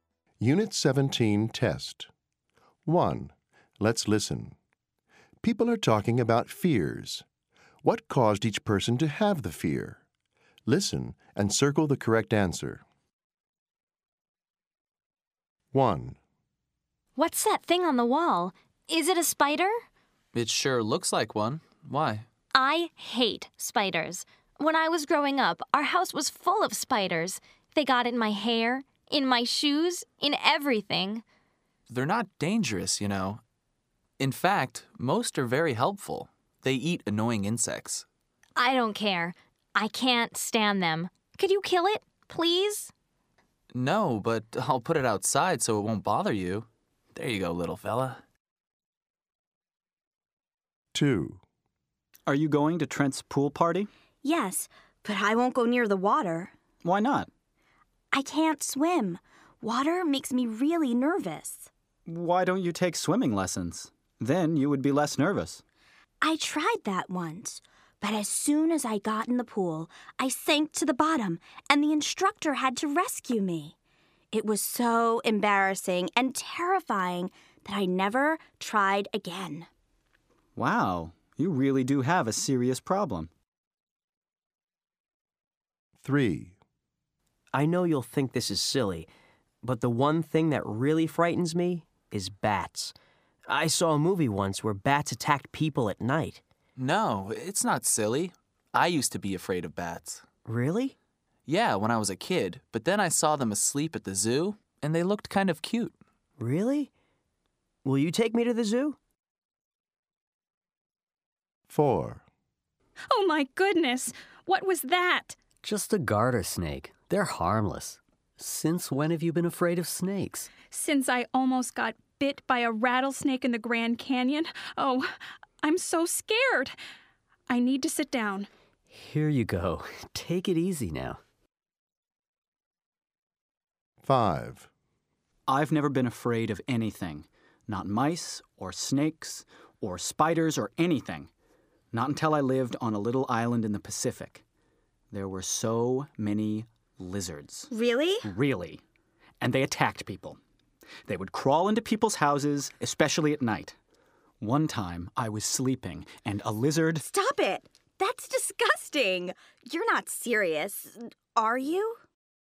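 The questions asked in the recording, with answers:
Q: What caused each person to have the fear?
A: Her house was full of spiders when she was growing up

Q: What caused each person to have the fear?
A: She sank to the bottom during a swimming lesson and had to be rescued

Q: What caused each person to have the fear?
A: A movie where bats attacked people

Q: What caused each person to have the fear?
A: Almost got bitten by a rattlesnake in the Grand Canyon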